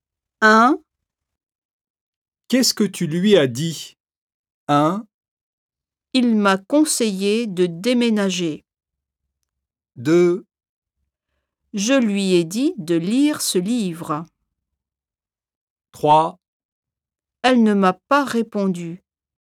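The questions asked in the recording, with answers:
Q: Qu'est-ce que tu lui as dit?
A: 2: Je lui ai dit de lire ce livre.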